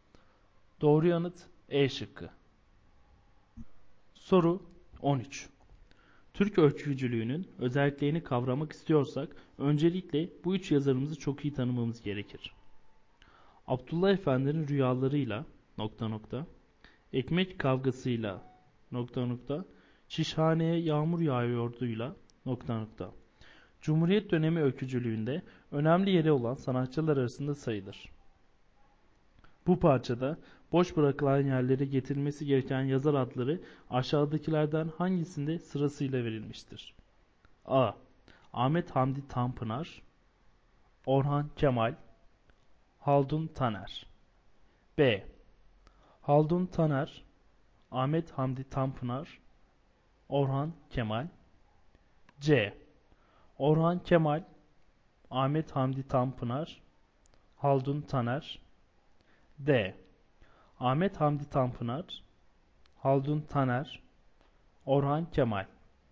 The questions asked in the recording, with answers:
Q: Bu parçada boş bırakılan yerlere getirilmesi gereken yazar adları aşağıdakilerden hangisinde sırasıyla verilmiştir?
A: Doğru yanıt C şıkkı.